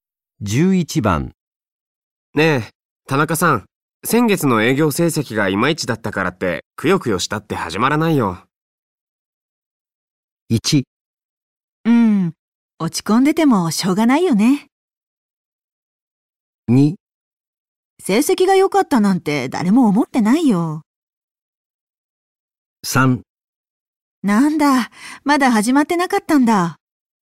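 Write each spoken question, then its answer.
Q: ねえ、田中さん。先月の営業成績がいまいちだったからって、くよくよしたって始まらないよ。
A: 1: うん、落ち込んでてもしょうがないよね。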